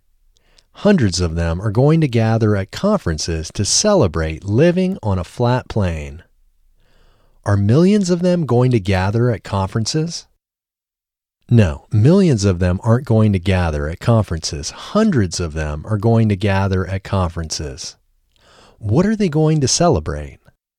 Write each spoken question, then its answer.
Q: What are they going to celebrate?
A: They are going to celebrate living on a flat plane.